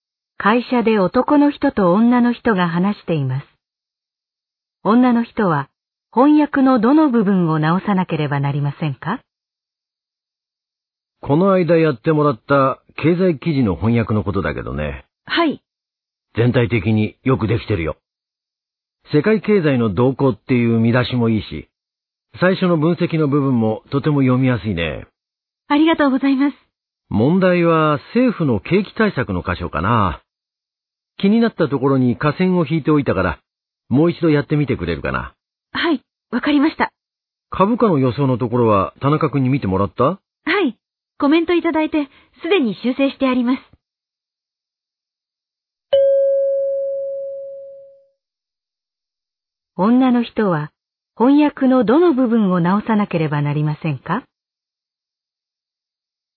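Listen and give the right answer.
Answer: 政府の景気対策の箇所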